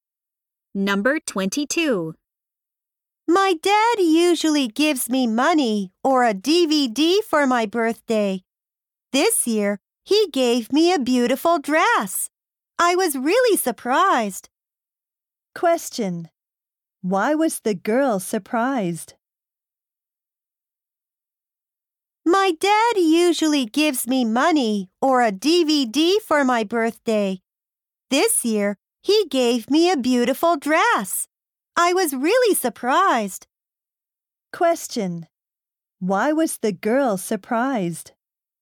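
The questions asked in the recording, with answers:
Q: Why was the girl surprised?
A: Her dad gave her a beautiful dress for her birthday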